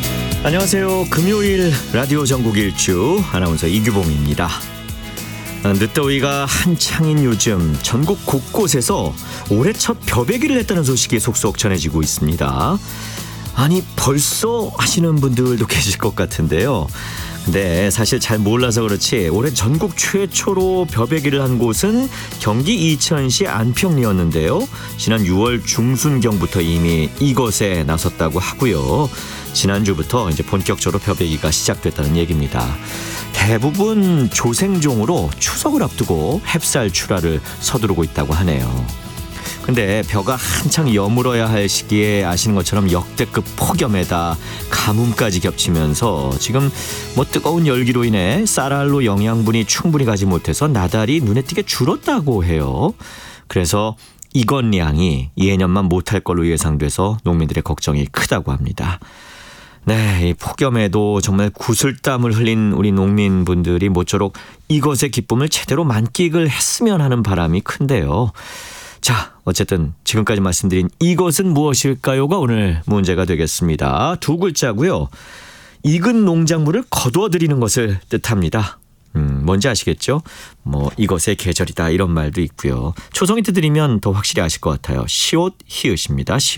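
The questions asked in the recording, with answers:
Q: 자, 어쨌든 지금까지 말씀드린 이것은 무엇일까요가 오늘 문제가 되겠습니다.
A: 수확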